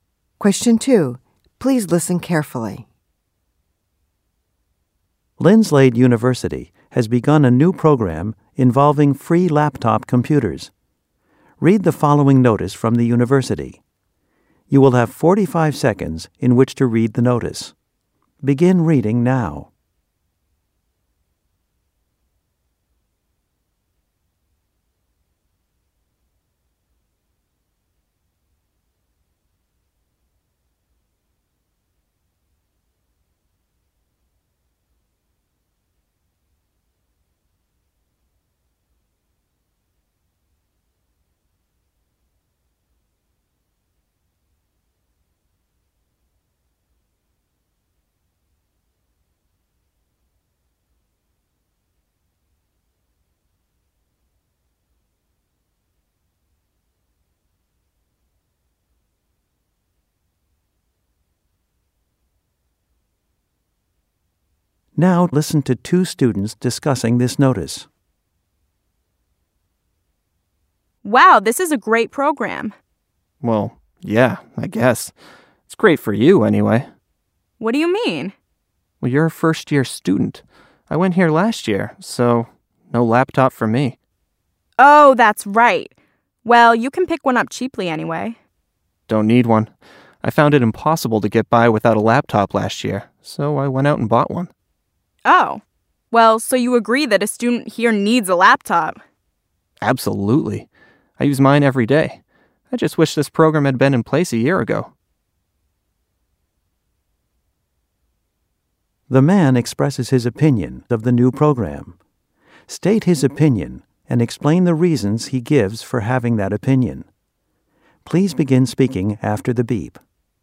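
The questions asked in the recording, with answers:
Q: The man expresses his opinion of the new program. State his opinion and explain the reasons he gives for having that opinion.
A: He thinks it is a good program: he found it impossible to get by without a laptop last year, had to buy one, and uses it every day; he only wishes the program had started a year earlier so he could have benefited.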